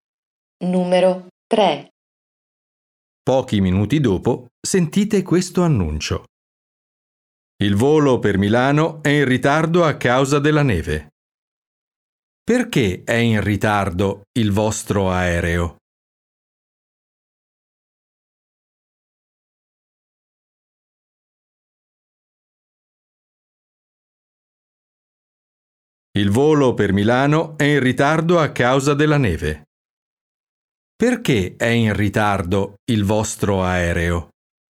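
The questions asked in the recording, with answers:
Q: Perché è in ritardo il vostro aereo?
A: A causa della neve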